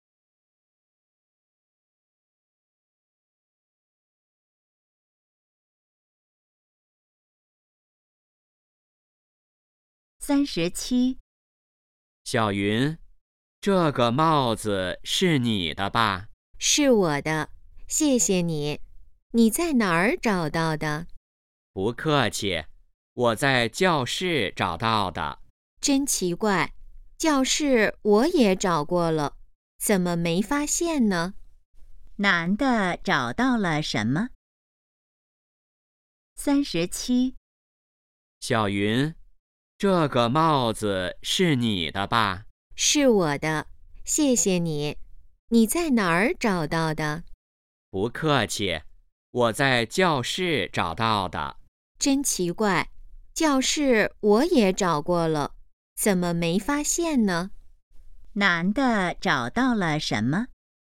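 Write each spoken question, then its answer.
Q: 男的找到了什么?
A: 帽子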